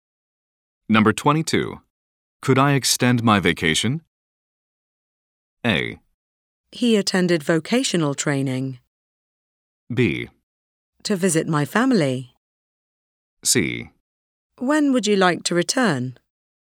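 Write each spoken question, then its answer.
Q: Could I extend my vacation?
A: C: When would you like to return?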